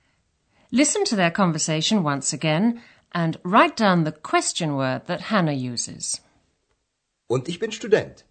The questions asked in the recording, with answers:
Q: write down the question word that Hannah uses.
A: The answer is what? Was.